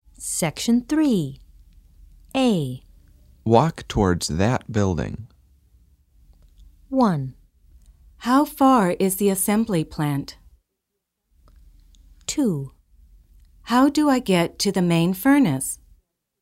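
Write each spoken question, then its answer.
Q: Walk towards that building.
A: 2: How do I get to the main furnace?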